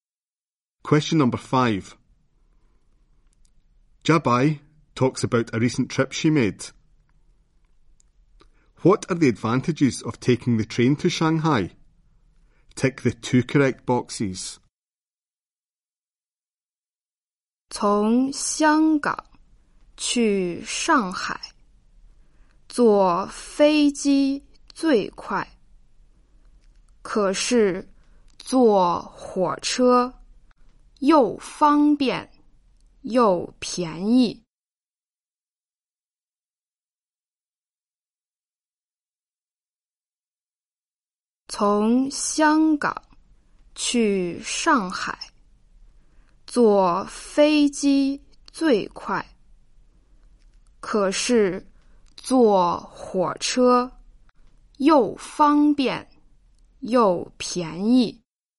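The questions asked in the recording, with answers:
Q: What are the advantages of taking the train to Shanghai?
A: It is convenient and cheap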